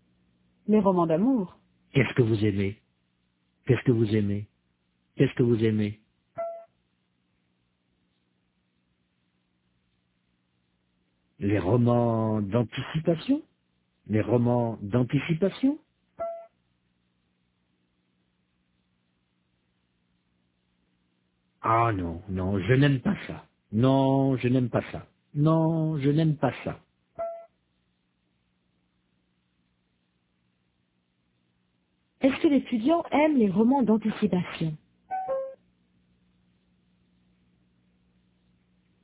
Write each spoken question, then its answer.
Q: Est-ce que l'étudiant aime les romans d'anticipation?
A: Non, il n'aime pas ça.